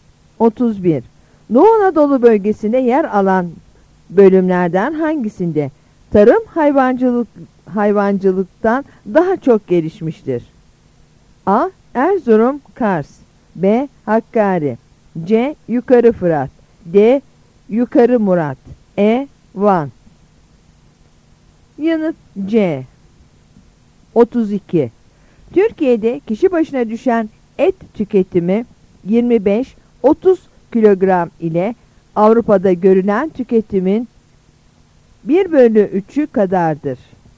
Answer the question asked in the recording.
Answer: Yanıt C.